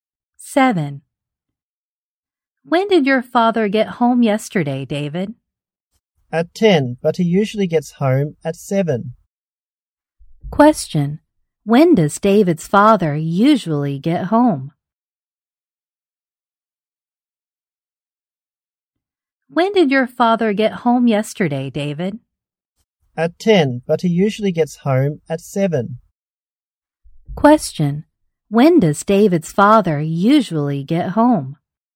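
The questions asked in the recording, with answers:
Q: When does David's father usually get home?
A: At 7.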